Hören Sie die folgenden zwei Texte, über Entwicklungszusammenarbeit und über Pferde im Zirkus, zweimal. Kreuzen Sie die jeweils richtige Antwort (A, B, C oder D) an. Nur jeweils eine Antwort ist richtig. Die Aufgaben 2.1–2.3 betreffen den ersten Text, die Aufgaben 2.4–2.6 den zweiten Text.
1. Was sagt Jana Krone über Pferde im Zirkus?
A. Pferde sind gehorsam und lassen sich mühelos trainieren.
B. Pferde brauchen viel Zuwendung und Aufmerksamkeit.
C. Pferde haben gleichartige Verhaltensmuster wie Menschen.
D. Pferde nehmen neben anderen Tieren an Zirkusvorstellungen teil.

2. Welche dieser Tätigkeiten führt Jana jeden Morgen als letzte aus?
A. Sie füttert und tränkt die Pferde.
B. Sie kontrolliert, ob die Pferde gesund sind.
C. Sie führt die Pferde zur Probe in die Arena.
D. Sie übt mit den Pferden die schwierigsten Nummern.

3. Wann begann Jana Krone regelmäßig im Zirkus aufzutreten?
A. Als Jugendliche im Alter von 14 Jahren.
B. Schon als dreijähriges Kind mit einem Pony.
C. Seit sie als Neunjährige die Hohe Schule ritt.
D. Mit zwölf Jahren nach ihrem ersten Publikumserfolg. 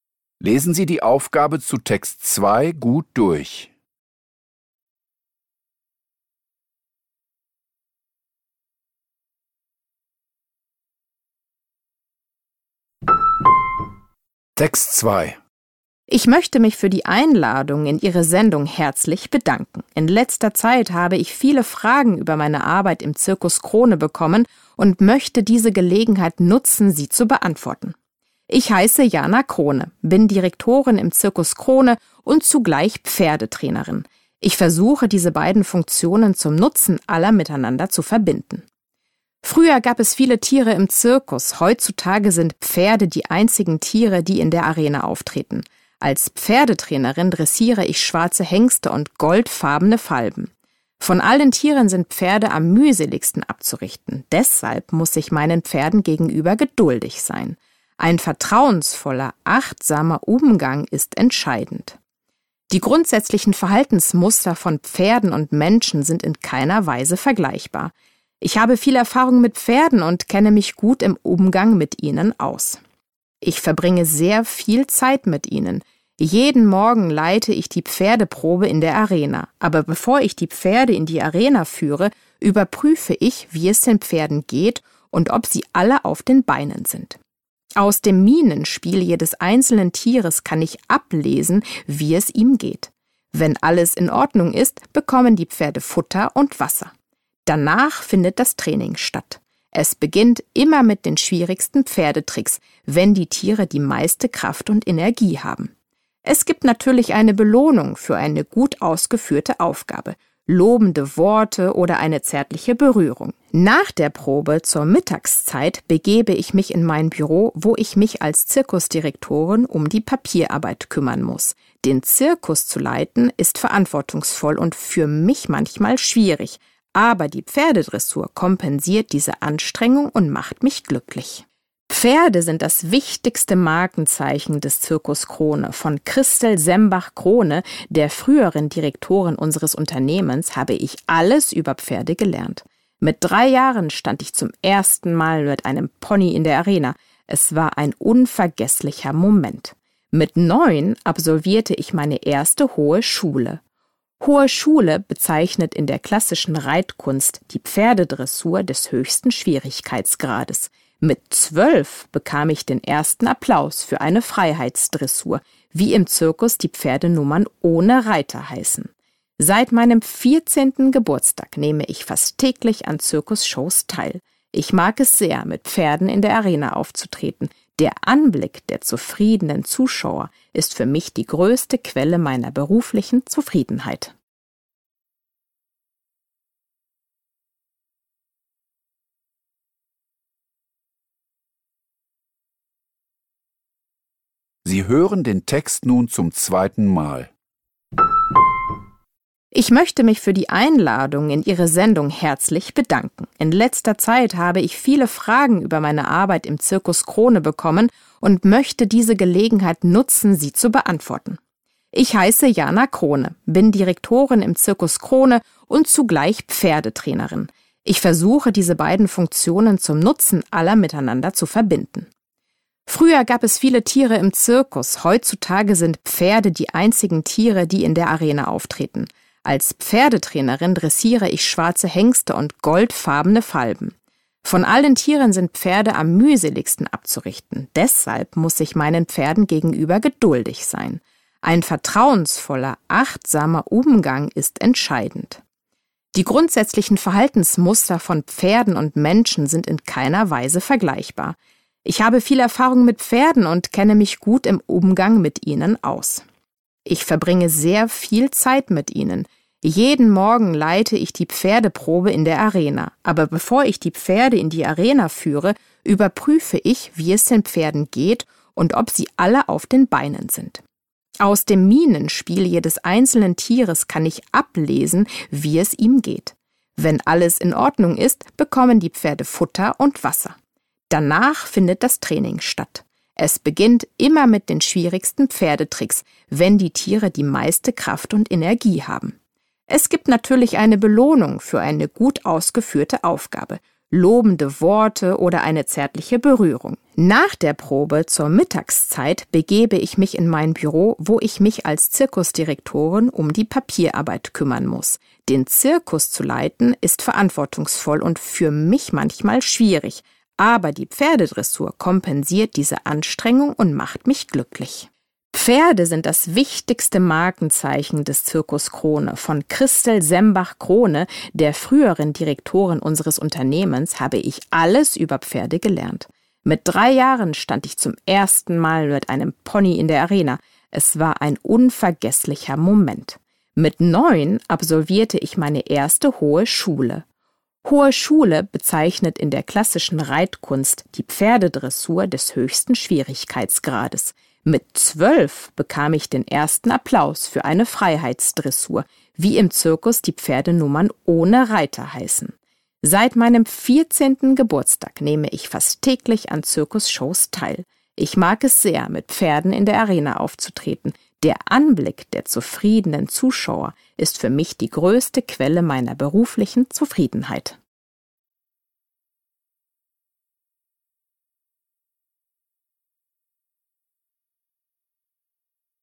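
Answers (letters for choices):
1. B
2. D
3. A

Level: Poziom: dwujęzyczny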